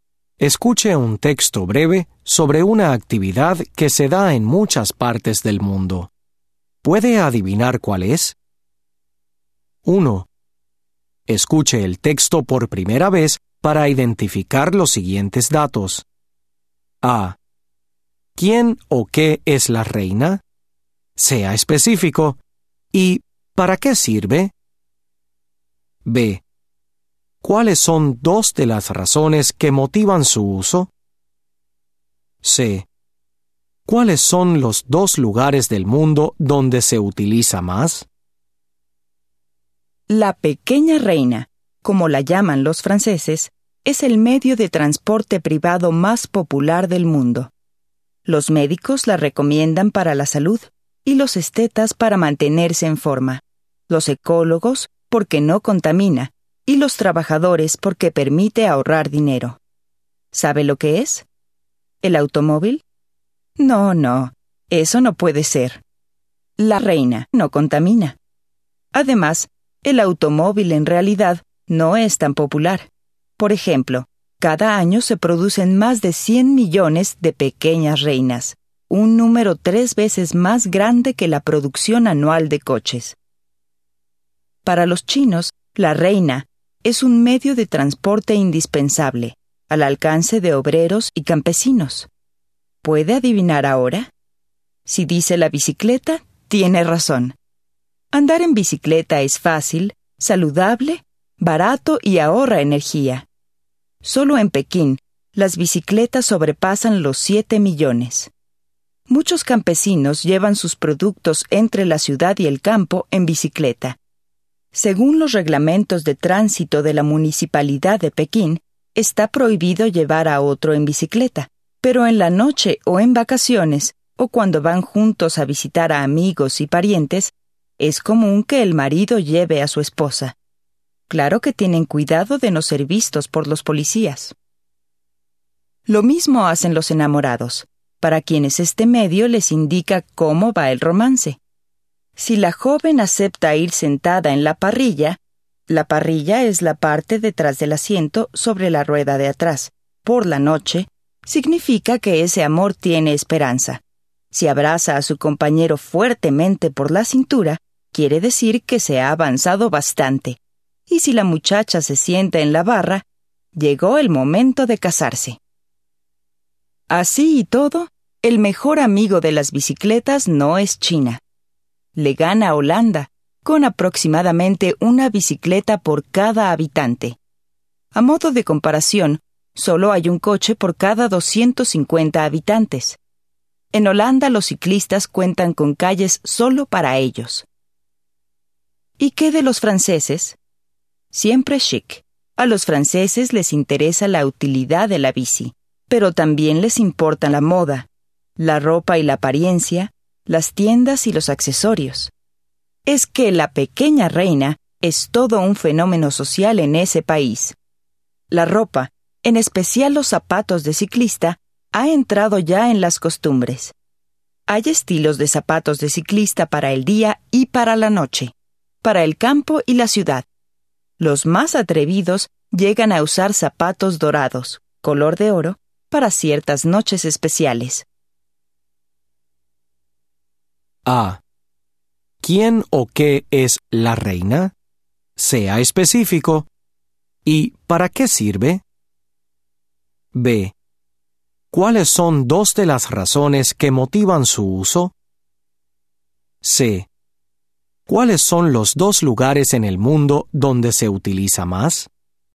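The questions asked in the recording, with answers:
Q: ¿Quién o qué es la reina?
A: La bicicleta, un medio de transporte privado

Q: ¿Cuáles son dos de las razones que motivan su uso?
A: Es buena para la salud y no contamina (también ahorra dinero)

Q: ¿Cuáles son los dos lugares en el mundo donde se utiliza más?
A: China y Holanda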